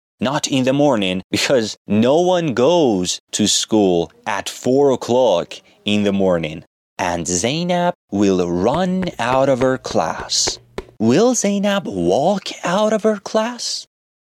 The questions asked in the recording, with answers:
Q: Will Zainab walk out of her class?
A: No. Zainab will run out of her class.